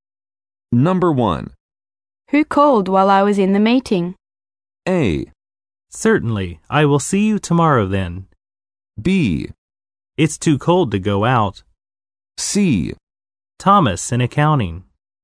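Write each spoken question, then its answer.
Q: Who called while I was in the meeting?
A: C: Thomas in accounting.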